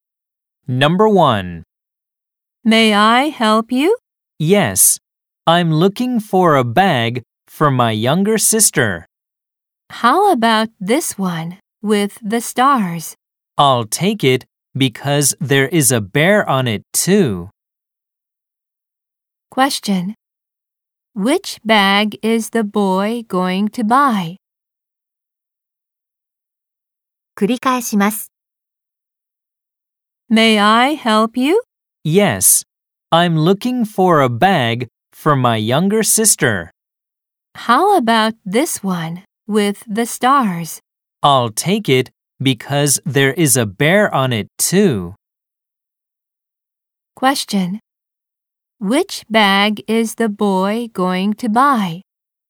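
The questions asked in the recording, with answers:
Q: Which bag is the boy going to buy?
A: The bag with stars and a bear on it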